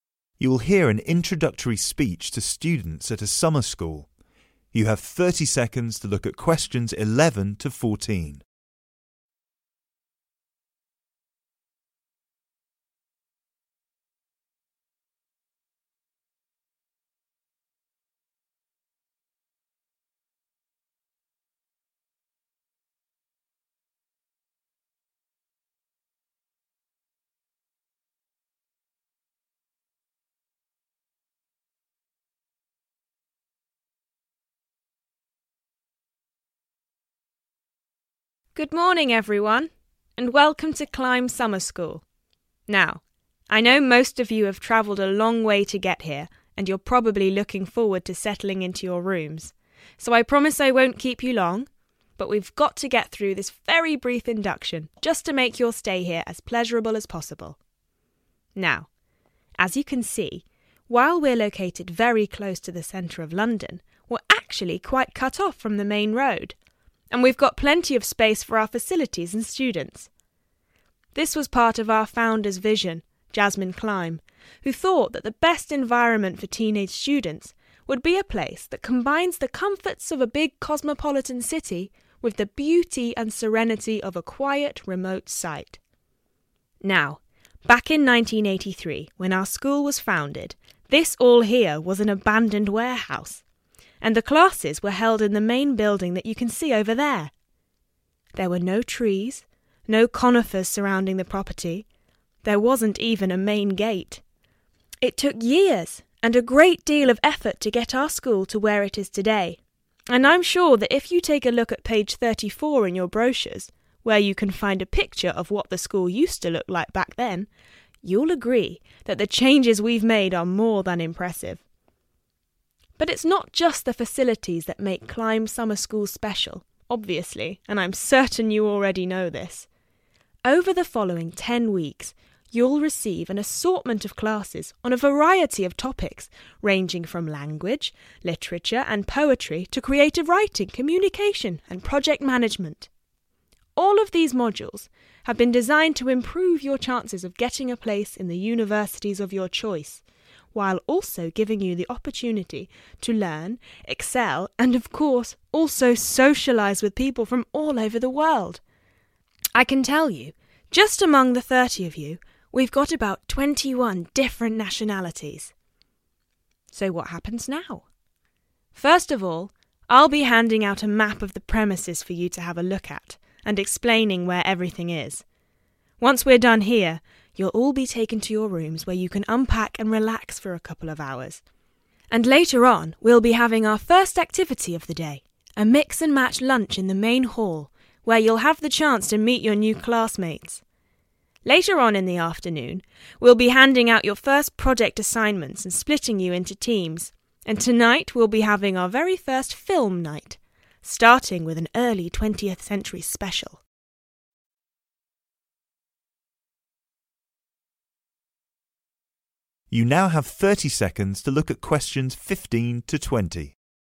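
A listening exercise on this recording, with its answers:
You are going to hear an induction given to a group of students at a summer school. Complete the sentences below. Write NO MORE THAN THREE WORDS for each answer.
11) Jasmine Climb founded her school on a quiet and isolated site because she appreciated the of such places.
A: beauty and serenity

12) When the school was first founded, it had neither trees nor a .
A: main gate

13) The students listening to the speech will be staying at the school for .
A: 10 weeks

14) The programme for the students' first day will culminate with a .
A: film night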